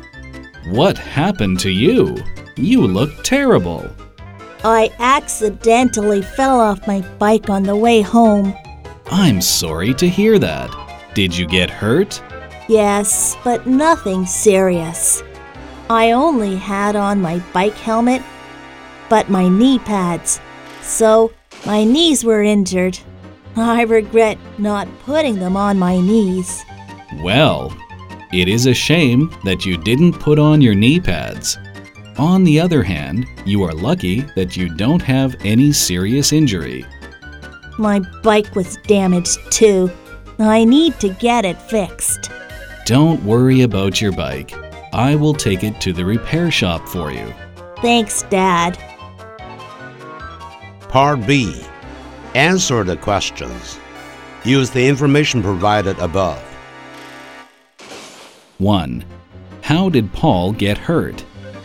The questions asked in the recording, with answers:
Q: How did Paul get hurt?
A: He fell off his bike.